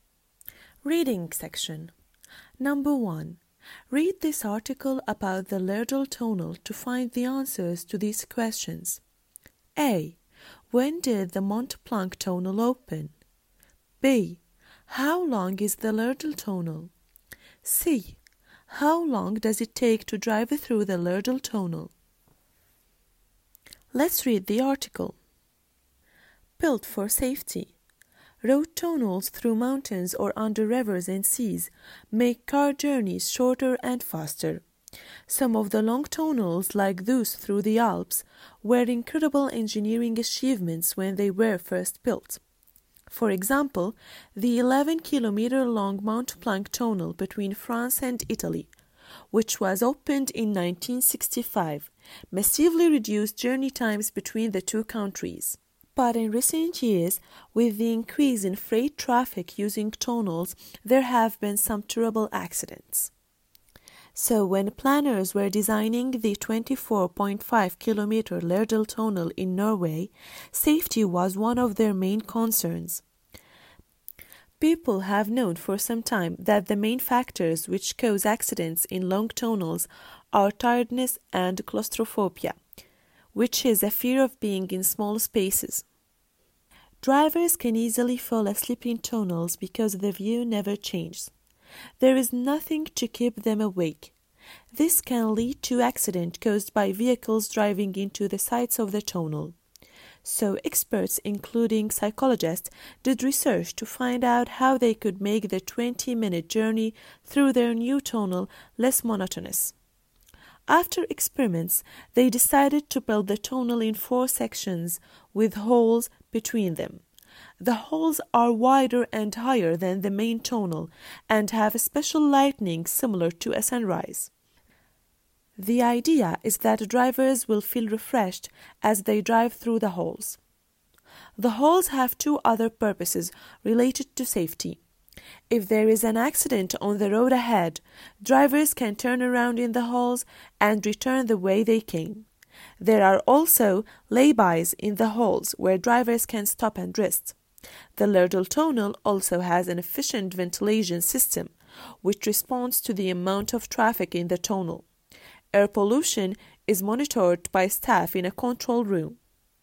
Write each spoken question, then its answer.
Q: When did the Mont-Blanc tonal open?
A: 1965.

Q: How long is the laryngeal tonal?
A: The answer is 24.5 kilometers.

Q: How long does it take to drive through the laryngeal tonal?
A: جواب هو 20 minutes.